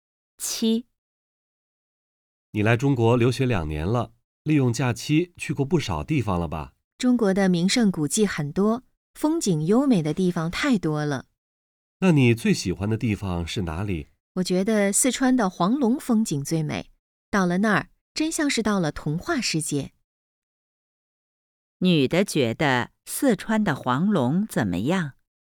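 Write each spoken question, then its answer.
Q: 女的觉得四川的黄龙怎么样?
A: 风景最美,像童话世界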